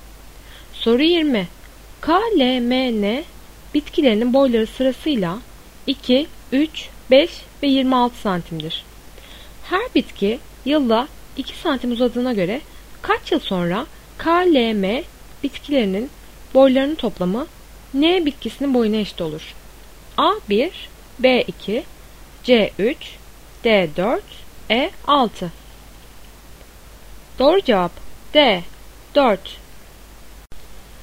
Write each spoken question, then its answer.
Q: Her bitki yılda 2 santim uzadığına göre kaç yıl sonra K, L, M bitkilerinin boylarının toplamı N bitkisinin boyuna eşit olur?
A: Doğru cevap D4.